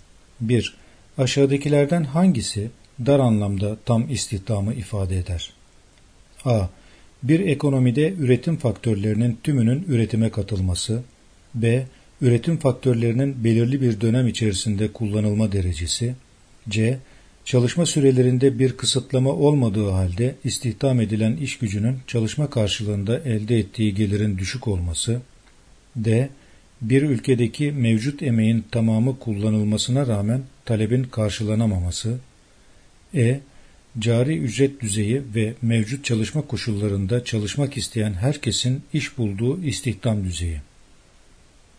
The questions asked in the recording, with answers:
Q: Aşağıdakilerden hangisi dar anlamda tam istihdamı ifade eder?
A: Yanıt E. Cari ücret düzeyi ve mevcut çalışma koşullarında çalışmak isteyen herkesin iş bulduğu istihdam düzeyi.